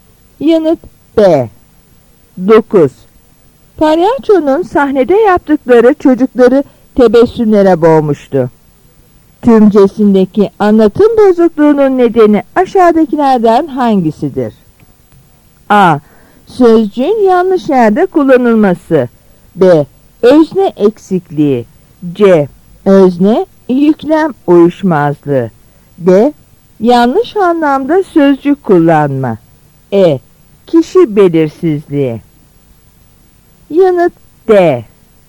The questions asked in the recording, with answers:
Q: Tümcesindeki anlatım bozukluğunun nedeni aşağıdakilerden hangisidir?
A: Yanıt D.